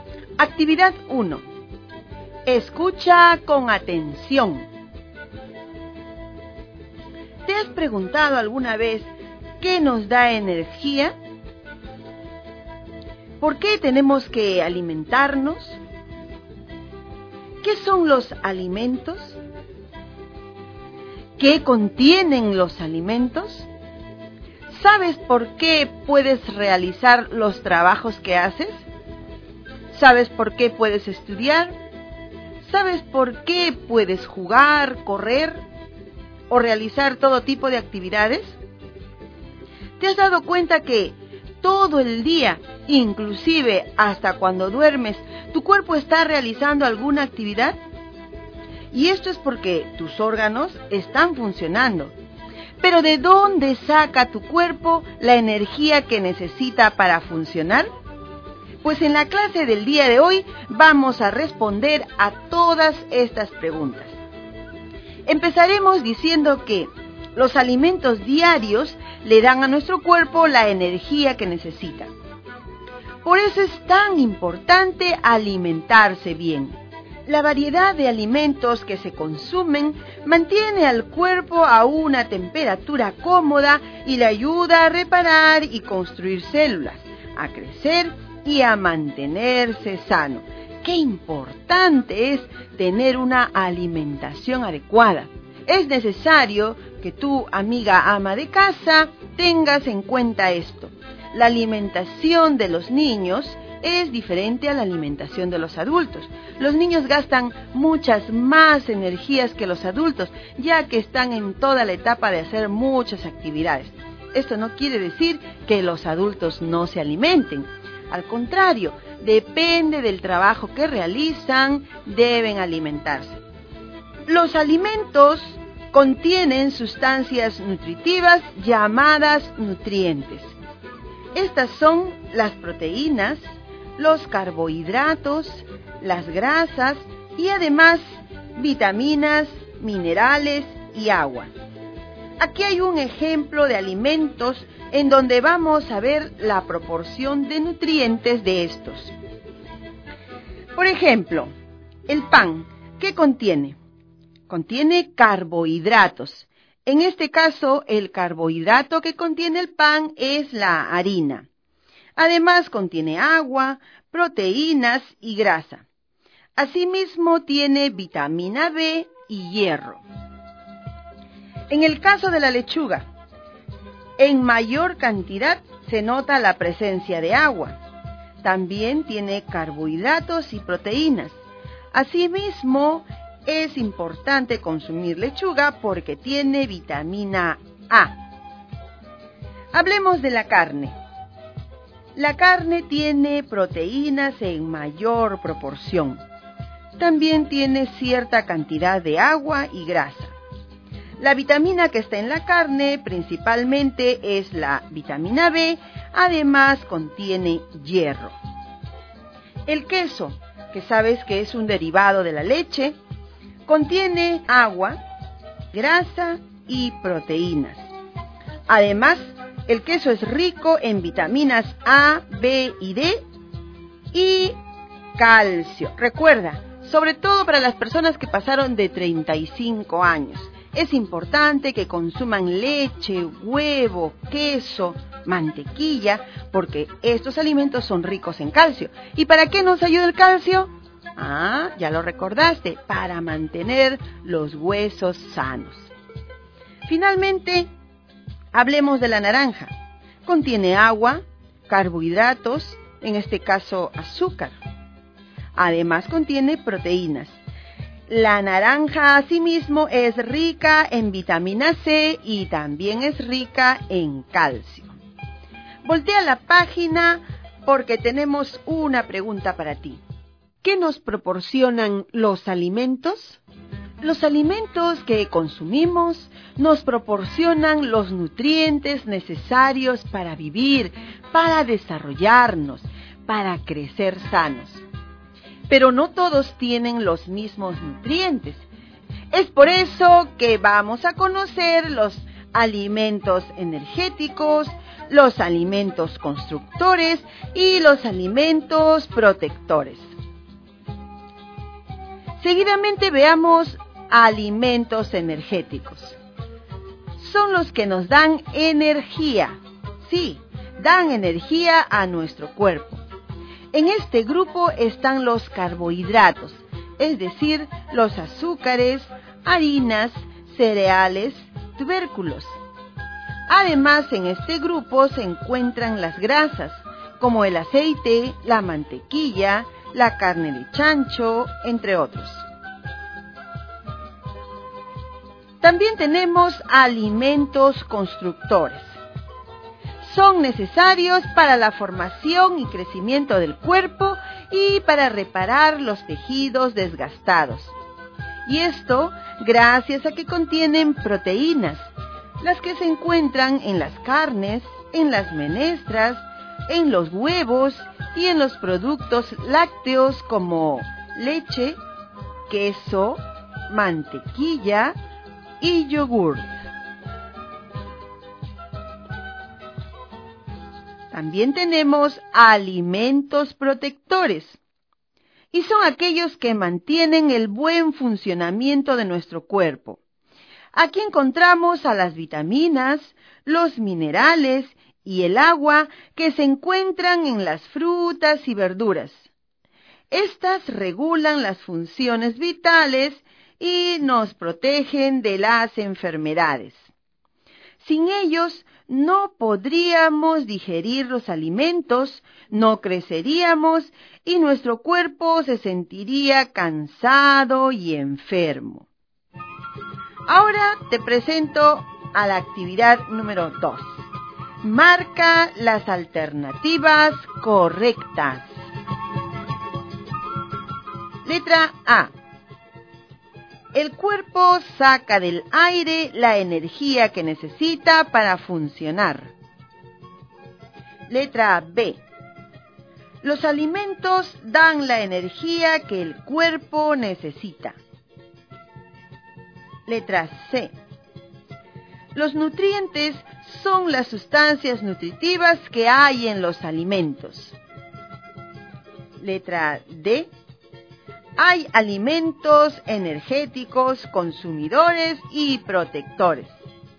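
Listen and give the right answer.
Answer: B: Los alimentos dan la energía que el cuerpo necesita; C: Los nutrientes son las sustancias nutritivas que hay en los alimentos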